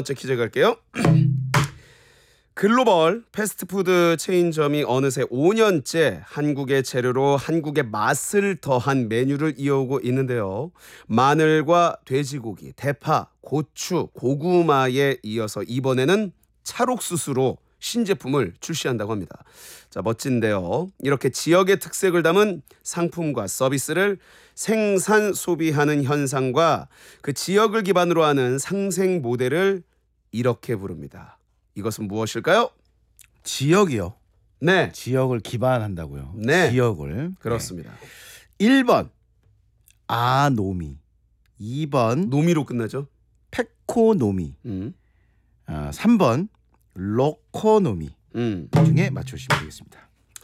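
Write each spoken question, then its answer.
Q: 이것은 무엇일까요?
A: 3: 로코노미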